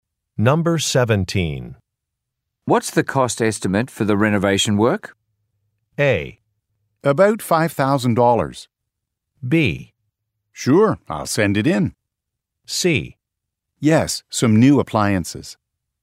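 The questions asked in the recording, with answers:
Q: What's the cost estimate for the renovation work?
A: A: About $5,000.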